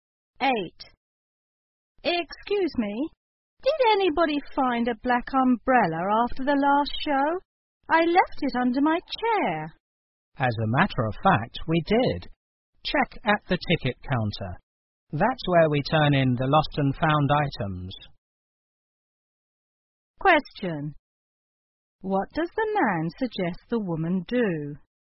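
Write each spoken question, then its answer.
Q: What does the man suggest the woman do?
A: Check at the ticket counter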